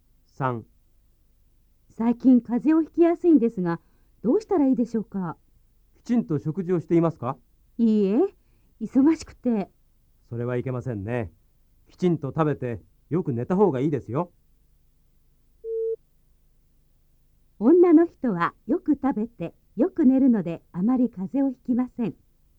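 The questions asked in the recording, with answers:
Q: 女の人はよく食べて、よく寝るので、あまり風邪をひきません。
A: ×(間違い)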